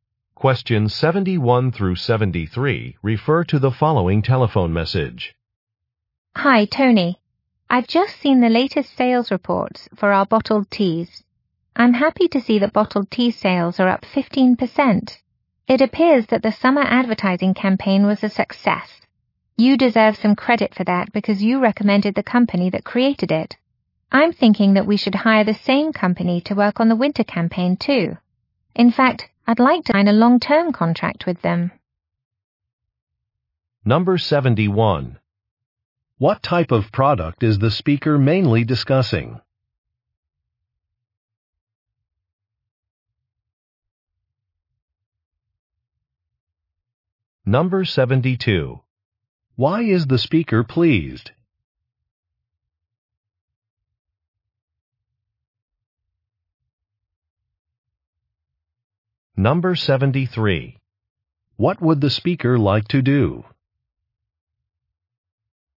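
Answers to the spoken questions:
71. Bottled tea
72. Sales increased by 15%
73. Sign a long-term contract with the advertising company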